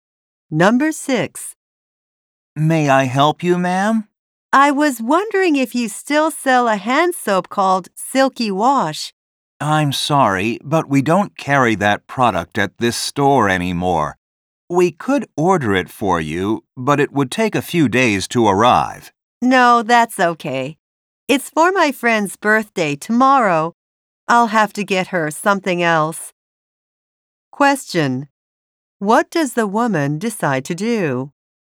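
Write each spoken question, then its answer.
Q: What does the woman decide to do?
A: Get her friend a different birthday present instead of Silky Wash.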